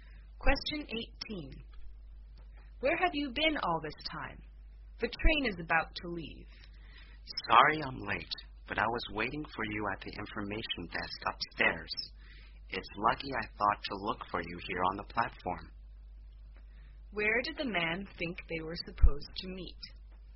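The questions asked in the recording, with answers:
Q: Where did the man think they were supposed to meet?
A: At the information desk upstairs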